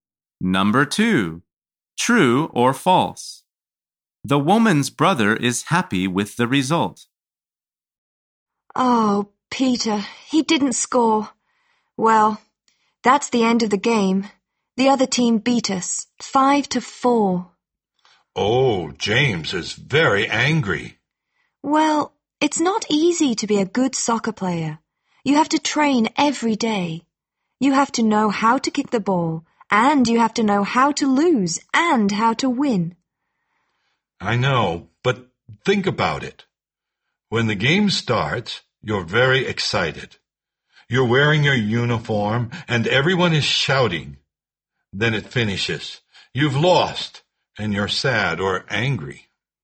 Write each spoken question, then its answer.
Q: The woman's brother is happy with the result.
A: answer is false. His team didn't win.